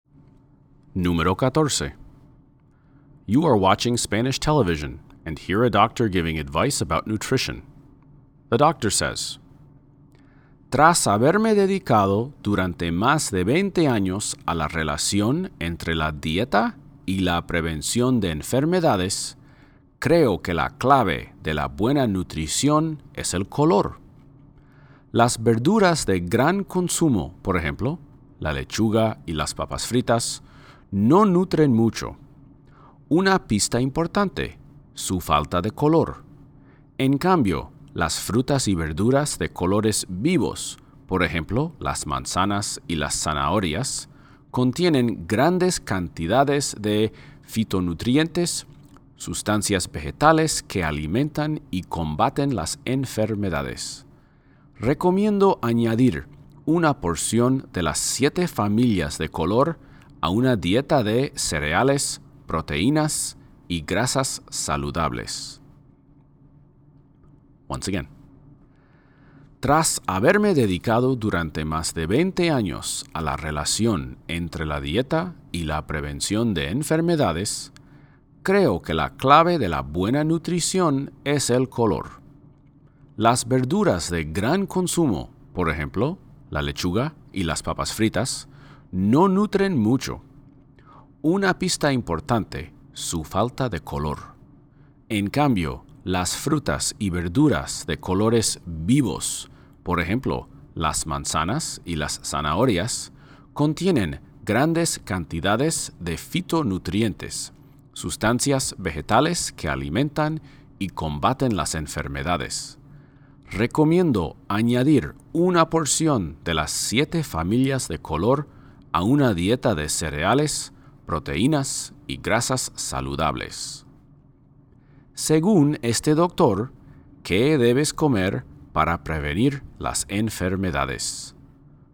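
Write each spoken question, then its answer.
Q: Según este doctor, ¿qué debes comer para prevenir las enfermedades?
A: Frutas y verduras de colores vivos (una porción de las 7 familias de color)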